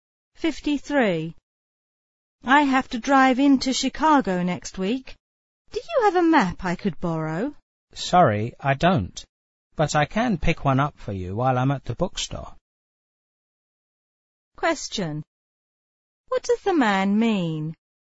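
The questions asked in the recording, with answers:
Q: What does the man mean?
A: He will get a map for the woman at the bookstore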